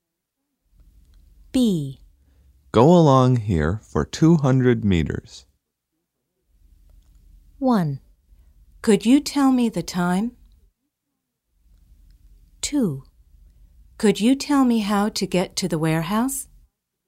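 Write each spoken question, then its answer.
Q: Go along here for 200 meters.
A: 2: Could you tell me how to get to the warehouse?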